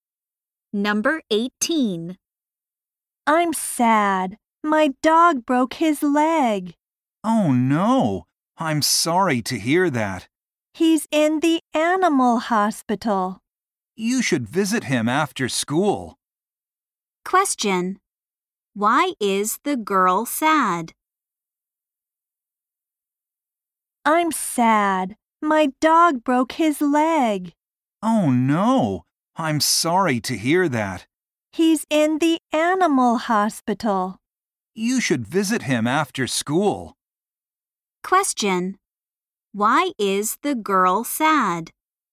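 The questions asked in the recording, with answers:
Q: Why is the girl sad?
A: Her dog broke his leg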